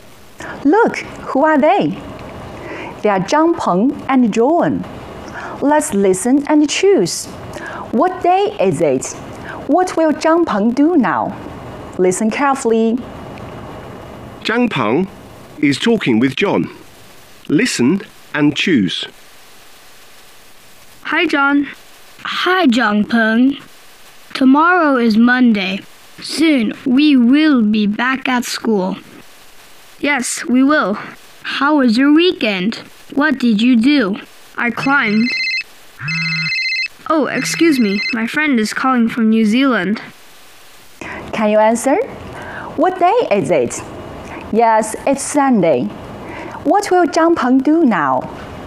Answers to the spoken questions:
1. Yes, it's Sunday.
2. He'll answer a call.